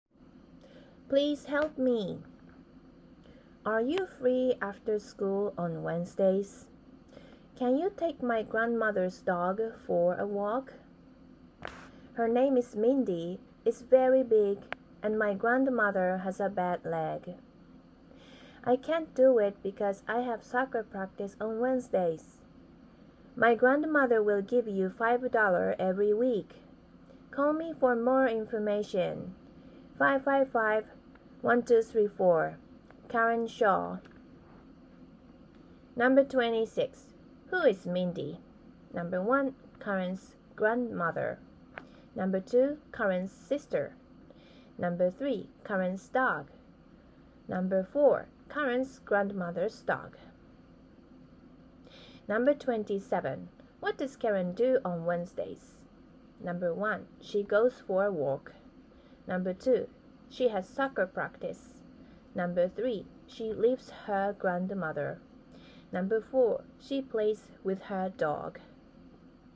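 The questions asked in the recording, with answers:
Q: Who is Mindy?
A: 4: Karen's grandmother's dog.

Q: What does Karen do on Wednesdays?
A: 2: She has soccer practice.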